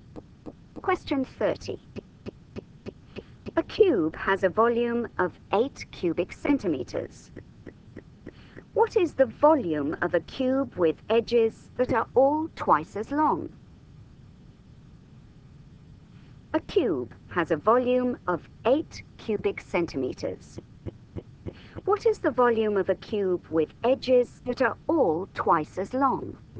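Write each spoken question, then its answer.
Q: What is the volume of a cube with edges that are all twice as long?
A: 64 cubic centimeters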